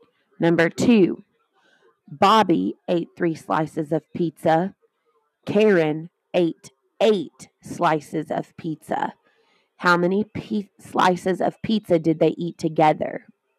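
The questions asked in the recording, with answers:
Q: How many slices of pizza did they eat together?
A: 11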